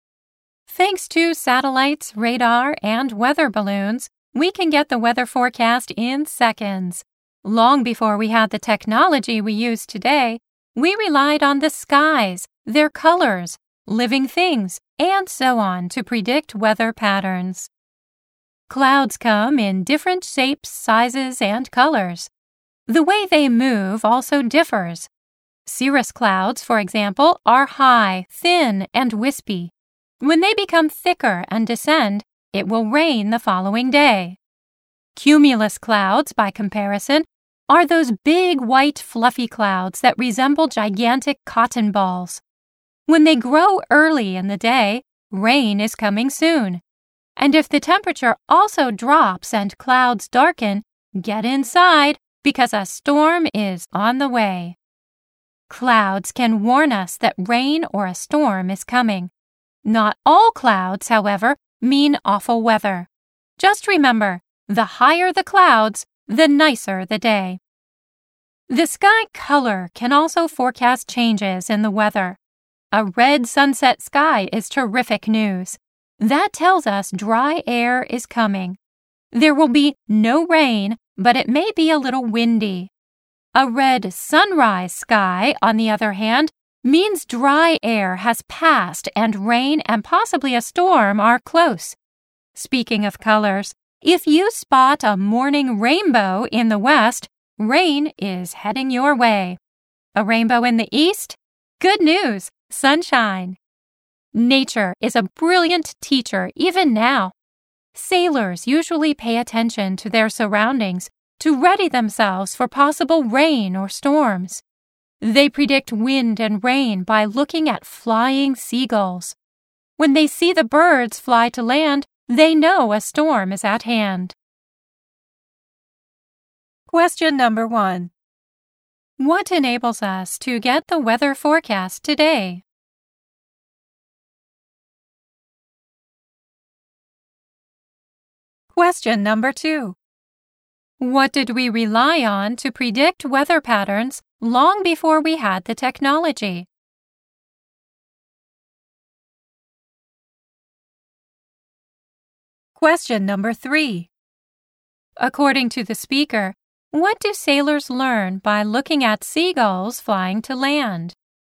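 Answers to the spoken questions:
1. Satellites, radar, and weather balloons.
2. The skies, their colors, living things, and so on.
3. That a storm is at hand.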